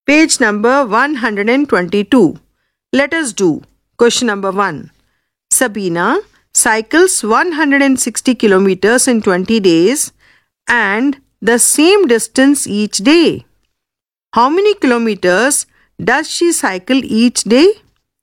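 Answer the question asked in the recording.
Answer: 8 kilometers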